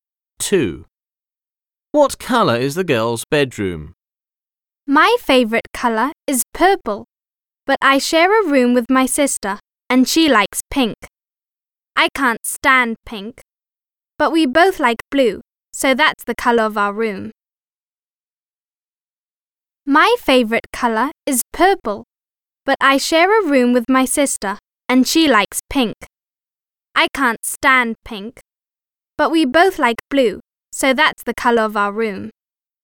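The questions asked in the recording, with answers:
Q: What colour is the girl's bedroom?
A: blue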